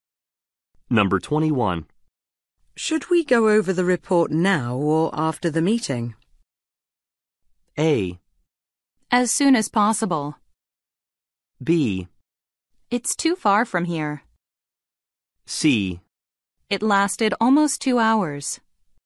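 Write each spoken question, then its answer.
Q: Should we go over the report now or after the meeting?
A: A: As soon as possible.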